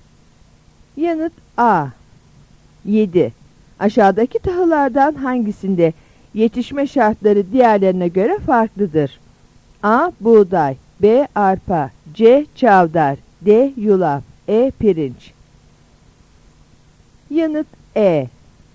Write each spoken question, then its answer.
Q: Aşağıdaki tahıllardan hangisinde yetişme şartları diğerlerine göre farklıdır?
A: Yanıt E.